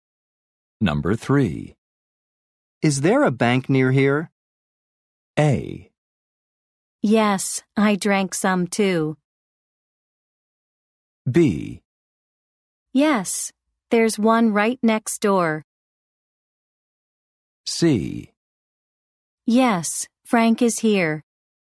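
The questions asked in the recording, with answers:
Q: Is there a bank near here?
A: B: Yes, there's one right next door.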